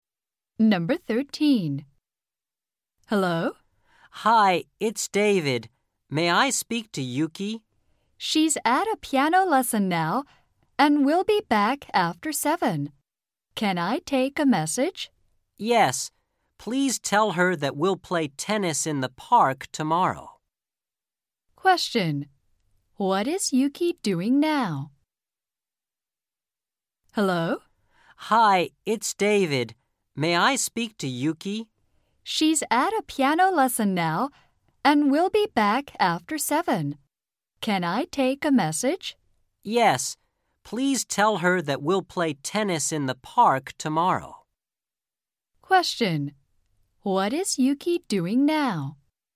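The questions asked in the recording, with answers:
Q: What is Yuki doing now?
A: She is at a piano lesson.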